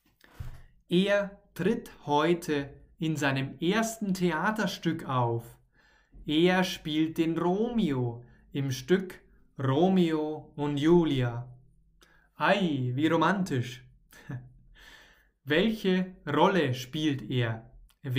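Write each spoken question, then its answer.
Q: Welche Rolle spielt er?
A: Romeo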